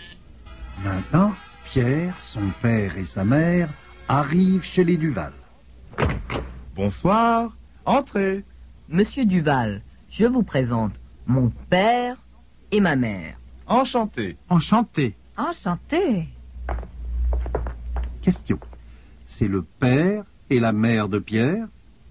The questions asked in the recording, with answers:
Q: C'est le père et la mère de Pierre?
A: Oui, c'est le père et la mère de Pierre.